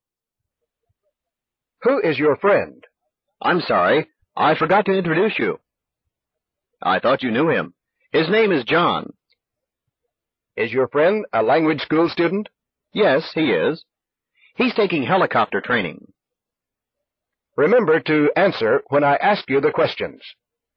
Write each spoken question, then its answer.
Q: Who is your friend?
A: His name is John.